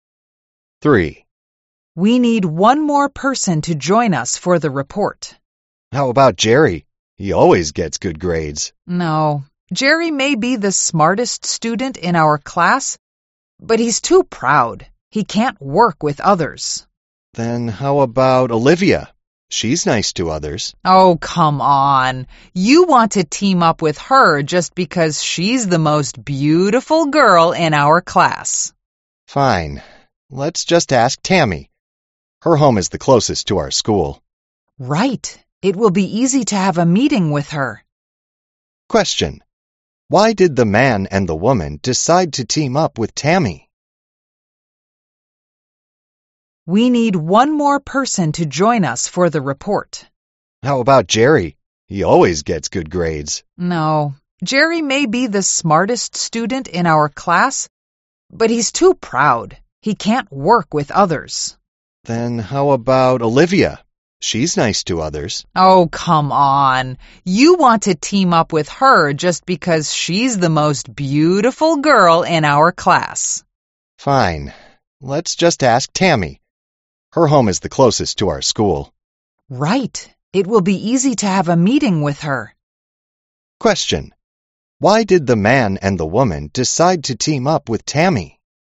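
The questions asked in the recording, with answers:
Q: Question.Why did the man and the woman decide to team up with Tammy?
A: Her home is the closest to their school, so it will be easy to have meetings with her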